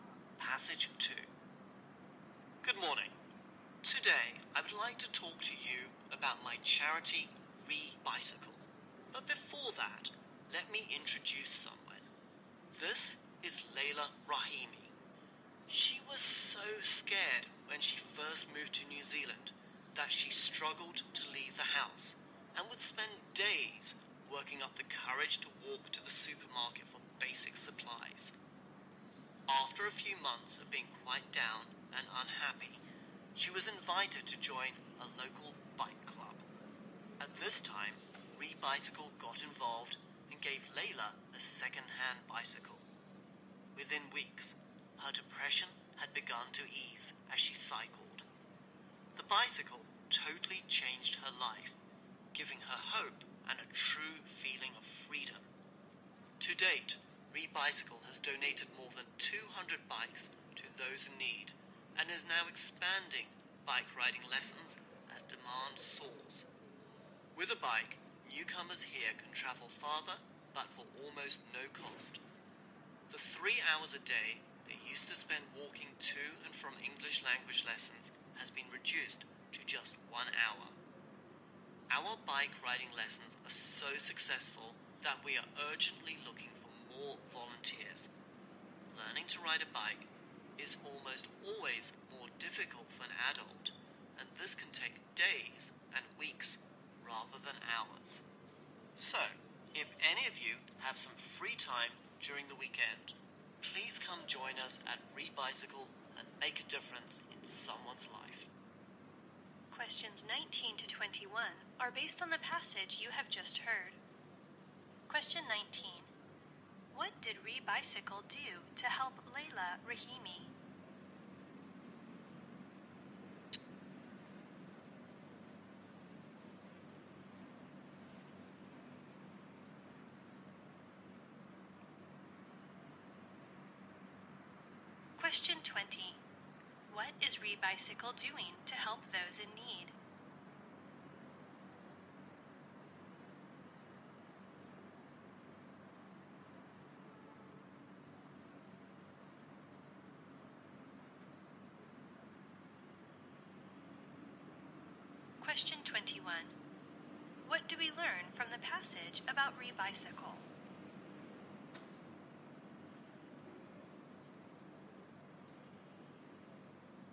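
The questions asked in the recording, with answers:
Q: What did ReBicycle do to help Layla Rahimi?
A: It gave her a second-hand bicycle.

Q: What is ReBicycle doing to help those in need?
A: It donates bikes and is expanding its bike riding lessons.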